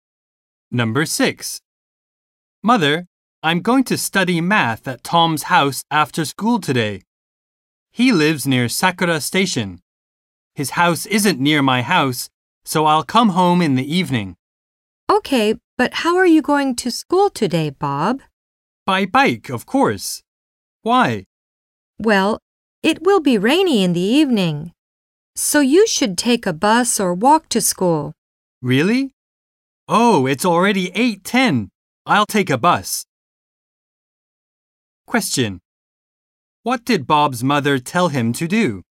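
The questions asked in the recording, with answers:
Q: What did Bob's mother tell him to do?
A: Take a bus or walk to school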